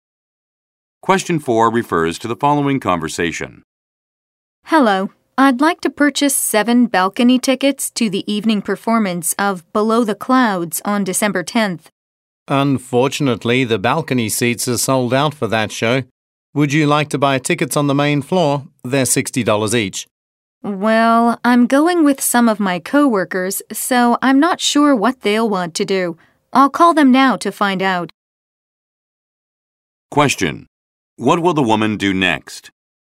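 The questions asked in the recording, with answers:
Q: What will the woman do next?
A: Call her co-workers to find out what they want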